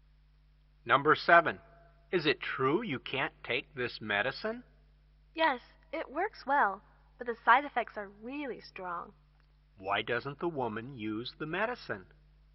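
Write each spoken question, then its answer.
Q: Why doesn't the woman use the medicine?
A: Its side effects are too strong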